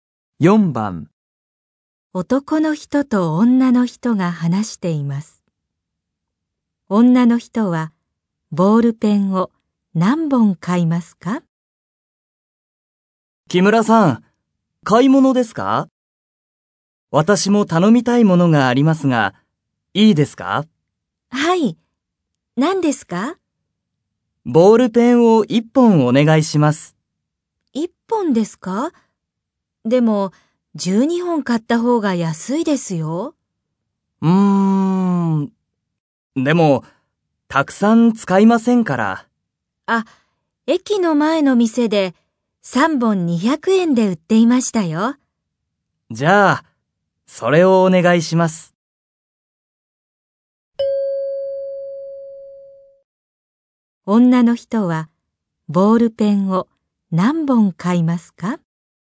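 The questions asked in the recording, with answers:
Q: 女の人はボールペンを何本買いますか?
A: 3本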